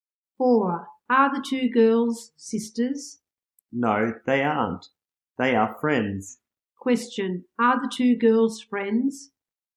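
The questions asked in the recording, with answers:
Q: Are the two girls friends?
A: Yes, they are.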